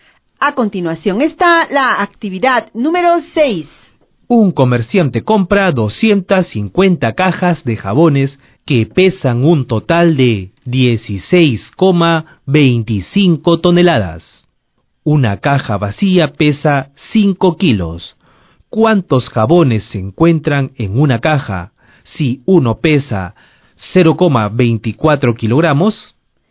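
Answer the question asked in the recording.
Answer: 250 jabones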